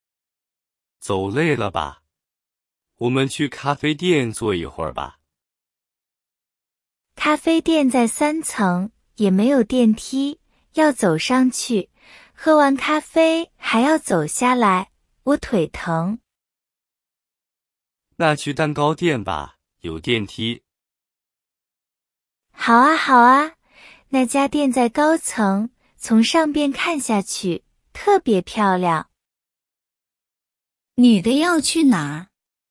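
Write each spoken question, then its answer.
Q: 女的要去哪儿?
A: 蛋糕店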